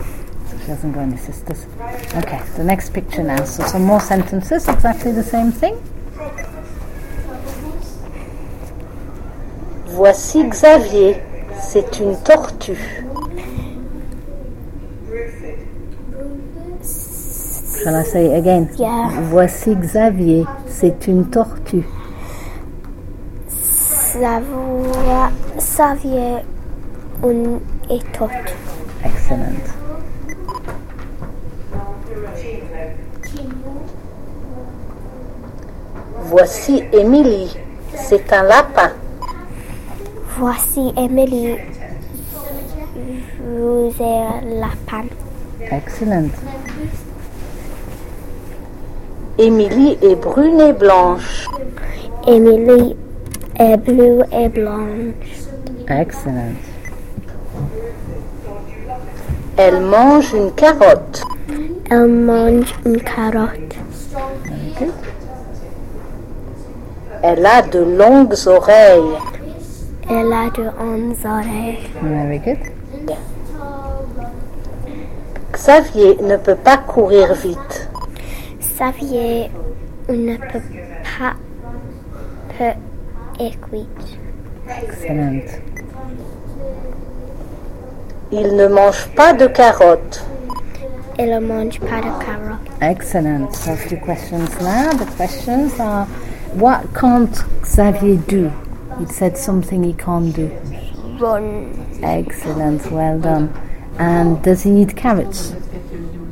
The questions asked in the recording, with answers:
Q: The questions are, what can't Xavier do?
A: Run.

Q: And does he need carrots?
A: No. Very good.